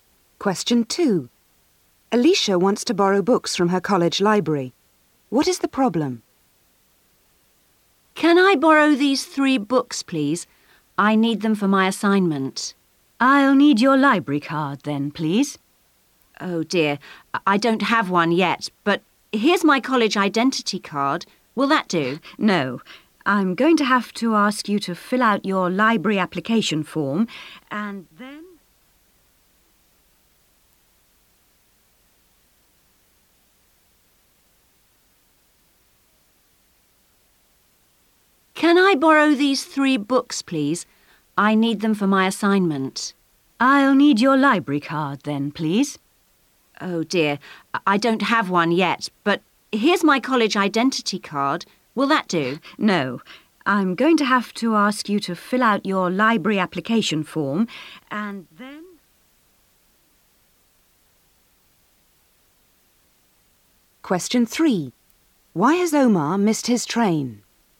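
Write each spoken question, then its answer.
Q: What is the problem?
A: She doesn't have a library card yet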